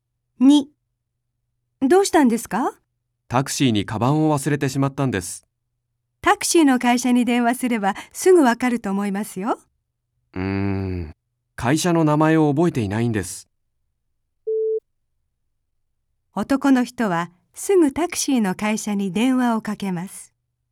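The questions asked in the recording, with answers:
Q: 男の人はすぐタクシーの会社に電話をかけます。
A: ×(正しくない)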